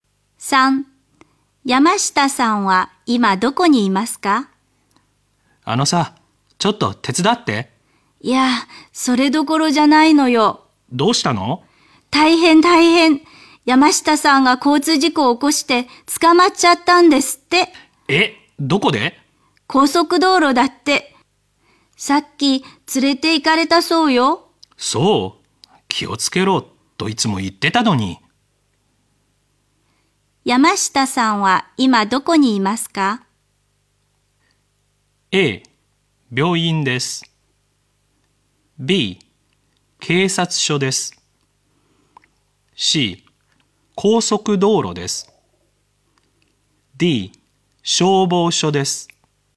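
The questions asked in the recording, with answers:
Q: 山下さんは今どこにいますか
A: B: 警察署です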